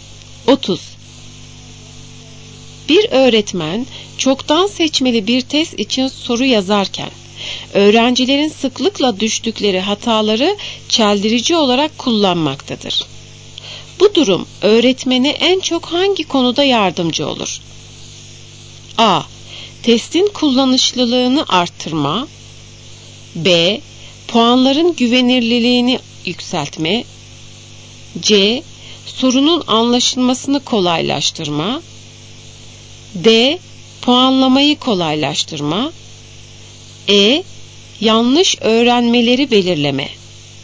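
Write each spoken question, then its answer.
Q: Bu durum öğretmene en çok hangi konuda yardımcı olur?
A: E: Yanlış öğrenmeleri belirleme.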